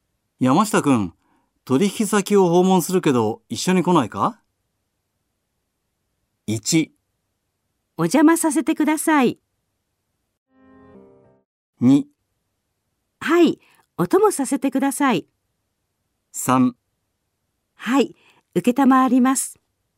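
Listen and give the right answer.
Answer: 2: はい、お供させてください。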